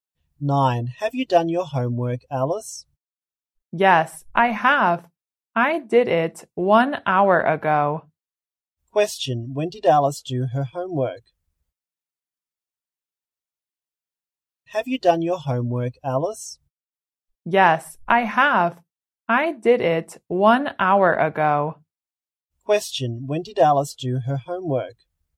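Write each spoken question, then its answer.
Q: when did Alice do her homework?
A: One hour ago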